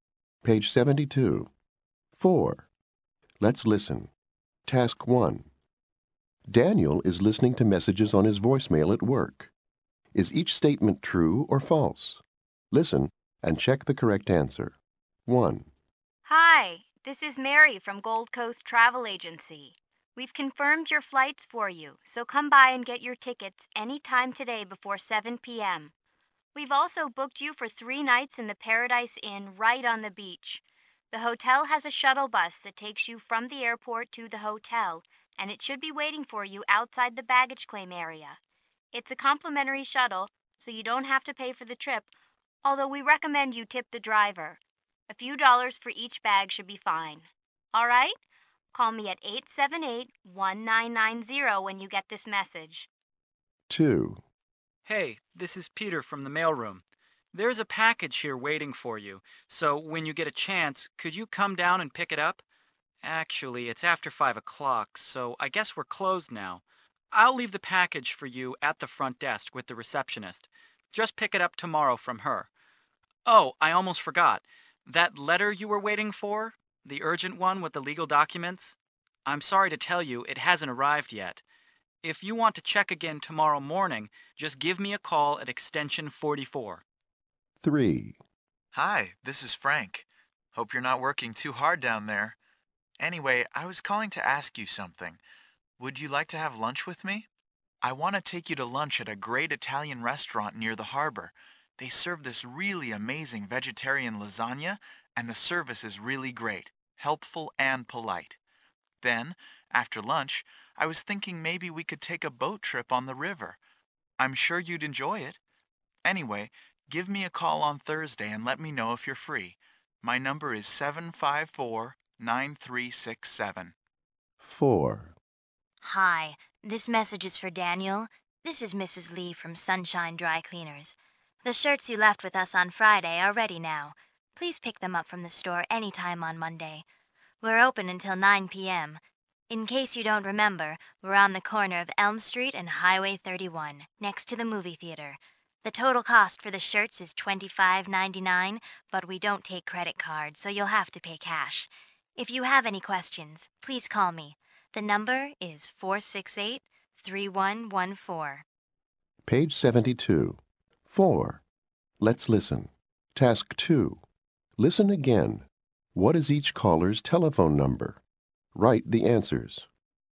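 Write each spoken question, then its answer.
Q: What is each caller's telephone number?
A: 1. Mary: 878-1990; 2. Peter: extension 44; 3. Frank: 754-9367; 4. Mrs. Lee: 468-3114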